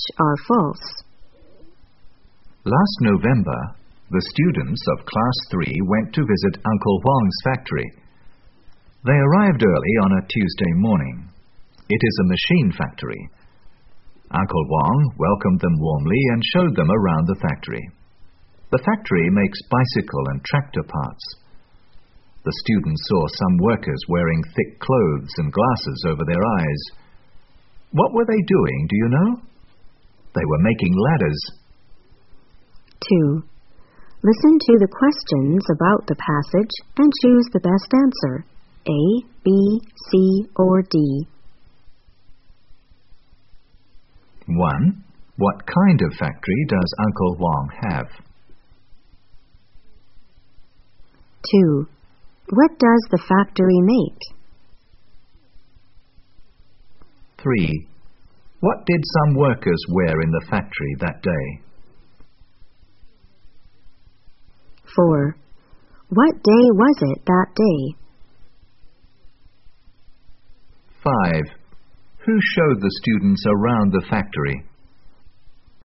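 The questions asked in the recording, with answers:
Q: What kind of factory does Uncle Huang have?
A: A machine factory

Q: What does the factory make?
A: Bicycle and tractor parts

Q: What did some workers wear in the factory that day?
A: Thick clothes and glasses over their eyes

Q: What day was it that day?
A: Tuesday

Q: Who showed the students around the factory?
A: Uncle Huang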